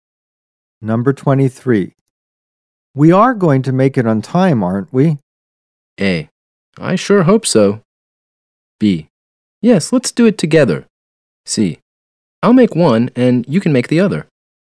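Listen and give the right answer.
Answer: A: I sure hope so.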